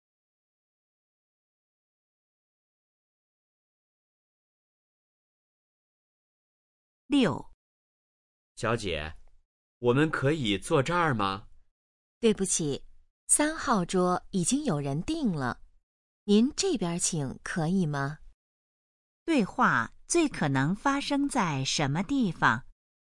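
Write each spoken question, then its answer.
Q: 对话最可能发生在什么地方?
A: 饭店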